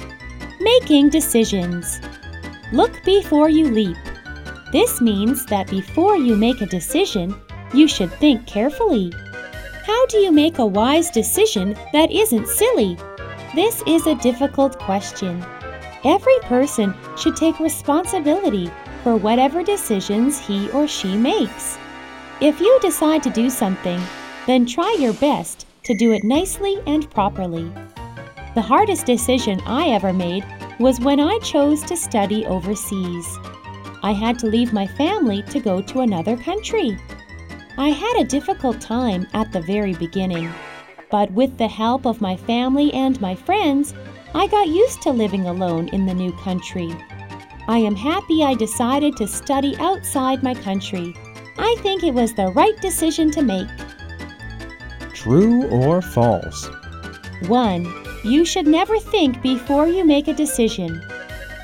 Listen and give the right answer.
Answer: False. You should think carefully before you make a decision.